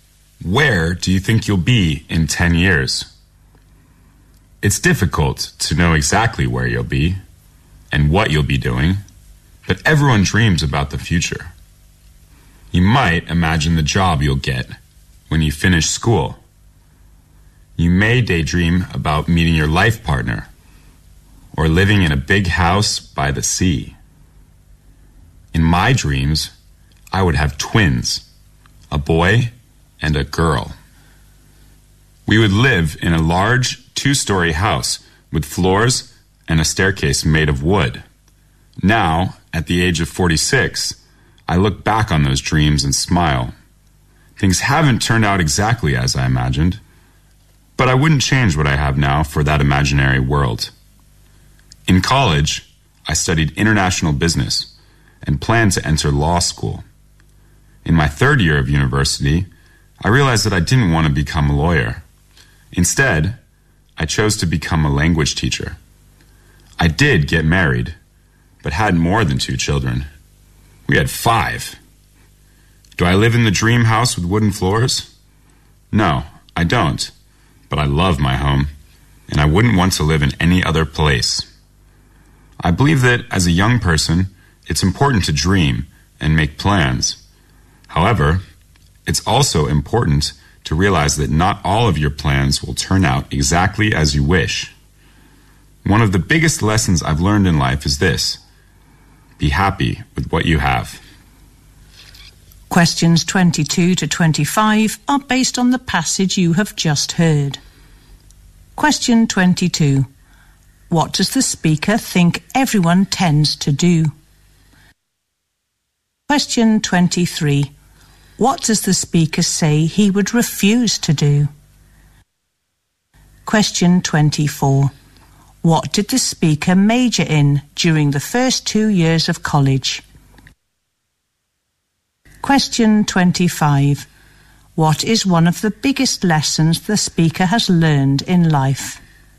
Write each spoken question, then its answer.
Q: What does the speaker think everyone tends to do?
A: Everyone dreams about their future.

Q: What does the speaker say he would refuse to do?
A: He wouldn't change what he has now for the imaginary world he had planned earlier in his life.

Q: What did the speaker major in during the first 2 years of college?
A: He studied international business.

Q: What is one of the biggest lessons the speaker has learned in life?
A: one of the biggest lessons he has learned in life is be happy with what you have.